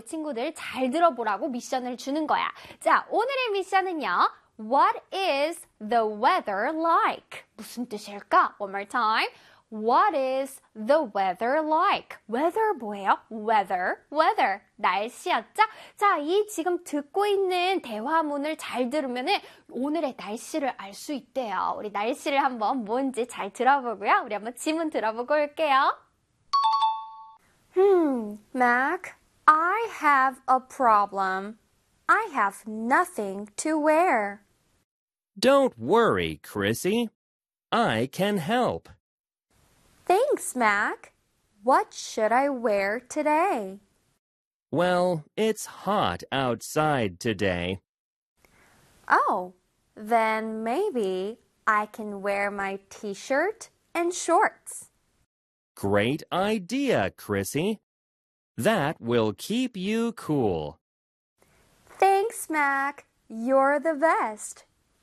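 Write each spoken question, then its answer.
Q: What is the weather like?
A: It's hot outside.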